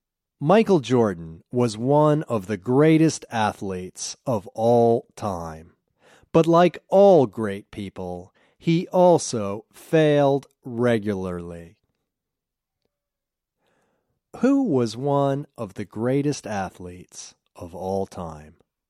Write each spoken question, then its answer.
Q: Who was one of the greatest athletes of all time?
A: Michael Jordan was one of the greatest athletes of all time.